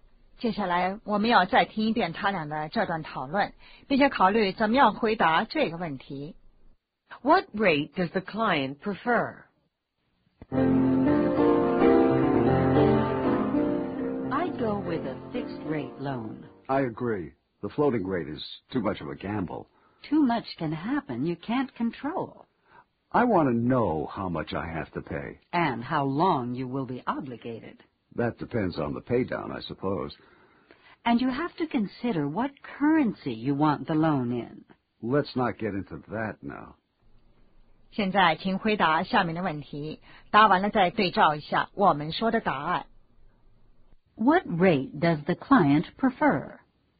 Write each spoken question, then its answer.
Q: What rate does the client prefer?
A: A fixed rate.